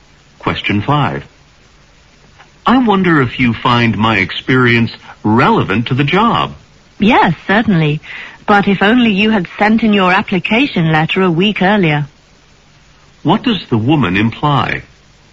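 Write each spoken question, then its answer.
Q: What does the woman imply?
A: The man applied too late; the job may already be filled.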